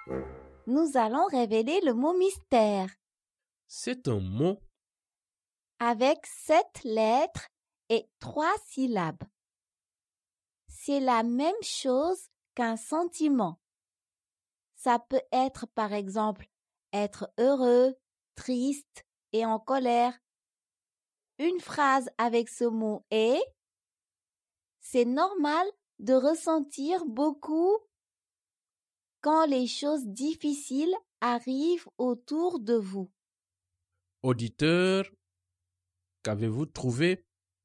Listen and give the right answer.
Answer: Le mot mystère est « émotion ».